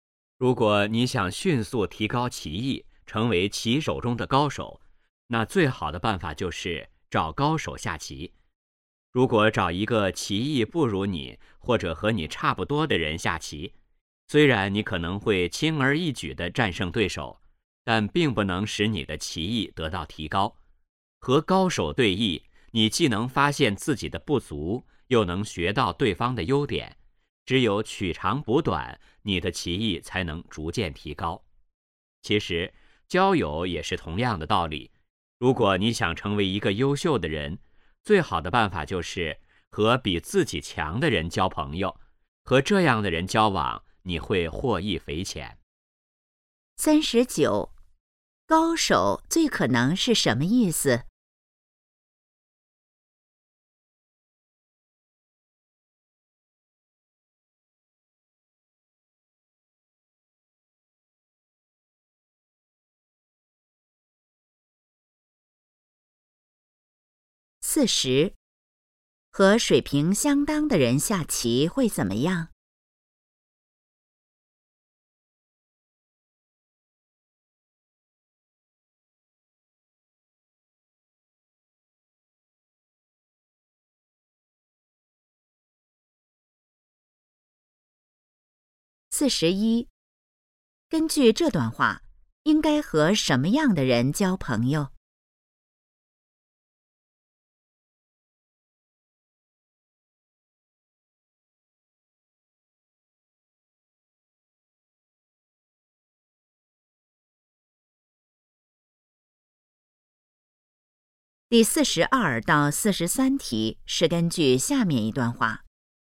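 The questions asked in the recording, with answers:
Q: 高手最可能是什么意思?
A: 技艺高超的人

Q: 和水平相当的人下棋会怎么样?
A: 棋艺得不到提高

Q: 根据这段话,应该和什么样的人交朋友?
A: 比自己强的人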